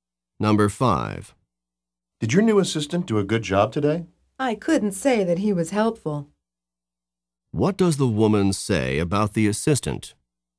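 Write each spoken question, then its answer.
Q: What does the woman say about the assistant?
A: He was not helpful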